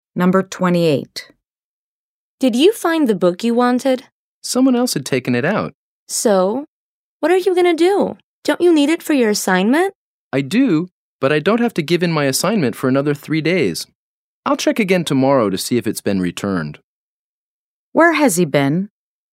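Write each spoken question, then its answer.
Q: Where has he been?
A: At the library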